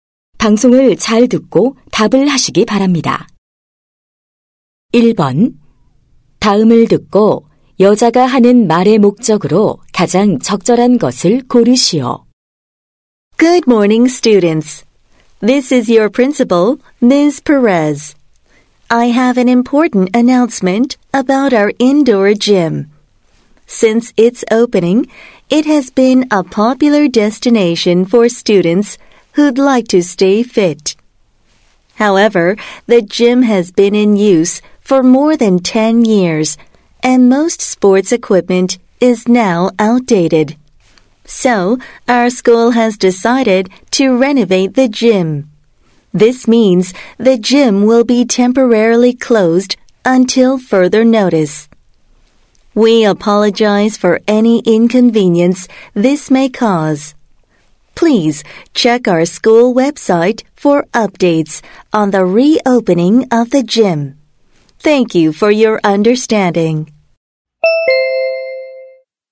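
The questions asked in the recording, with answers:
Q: 다음을 듣고 여자가 하는 말의 목적으로 가장 적절한 것을 고르시오.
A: 실내 체육관 리모델링으로 인한 임시 폐쇄를 알리려고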